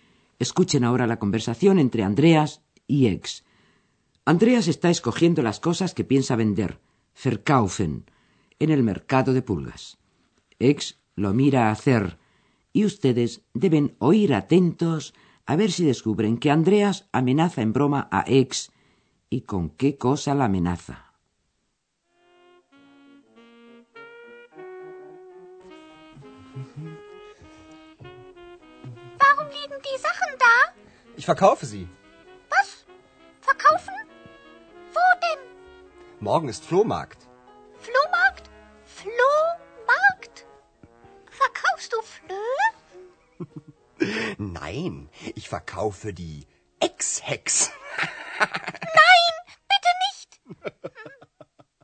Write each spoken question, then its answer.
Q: ustedes deben oír atentos a ver si descubren que Andreas amenaza en broma a Ex y con qué cosa la amenaza.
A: Andreas amenaza a Ex, Seguro que ya lo han adivinado con venderla a ella junto con las demás cosas.